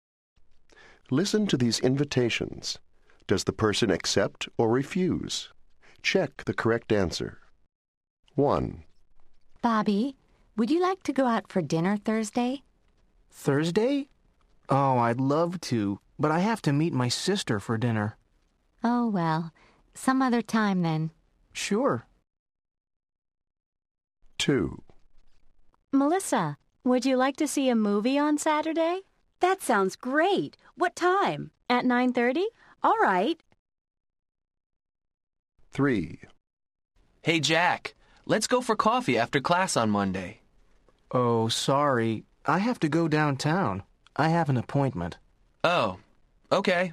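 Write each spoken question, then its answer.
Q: Does the person accept or refuse?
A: refuse

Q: Does the person accept or refuse?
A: accept

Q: Does the person accept or refuse?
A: refuse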